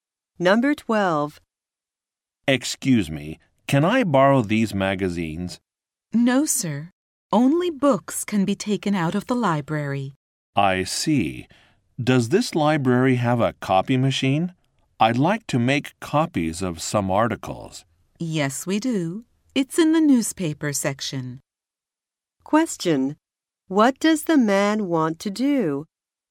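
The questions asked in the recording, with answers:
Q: What does the man want to do?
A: Make copies of some magazine articles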